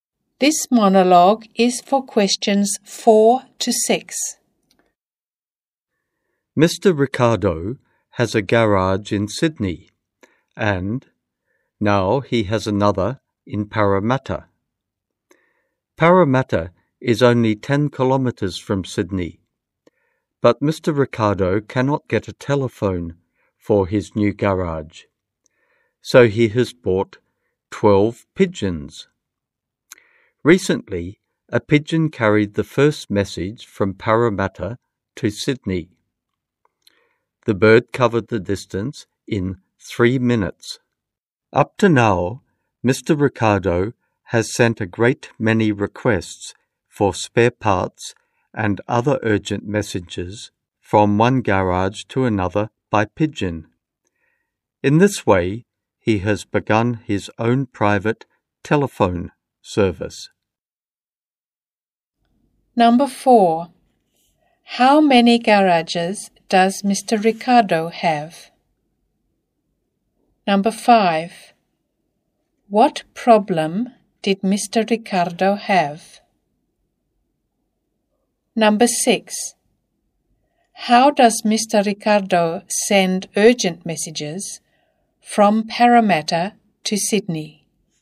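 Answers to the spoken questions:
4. Two
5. He couldn't get a telephone for his new garage.
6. By pigeon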